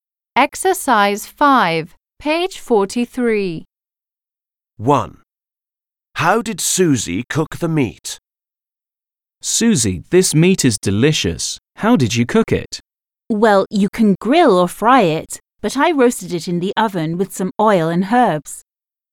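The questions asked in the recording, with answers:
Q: How did Susie cook the meat?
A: She roasted it in the oven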